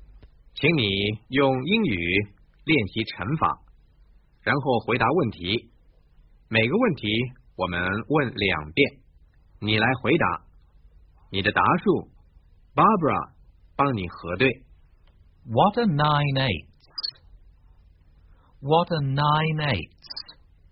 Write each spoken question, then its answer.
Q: What are 9 eighths?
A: 72。